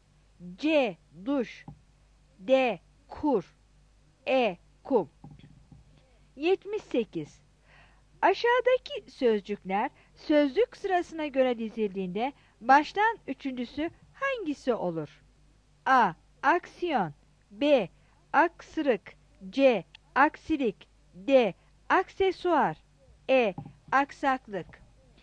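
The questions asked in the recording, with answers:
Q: Aşağıdaki sözcükler sözlük sırasına göre dizildiğinde baştan üçüncüsü hangisi olur?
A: B: Aksırık.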